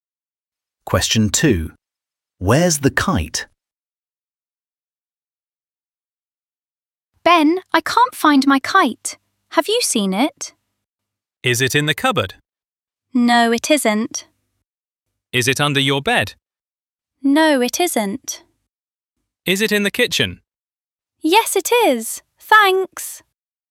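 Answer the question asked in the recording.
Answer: In the kitchen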